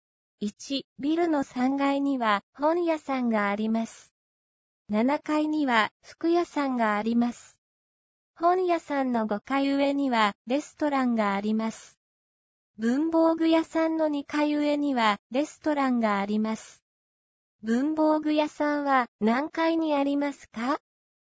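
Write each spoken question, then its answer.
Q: 文房具屋さんは何階にありますか?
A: 6階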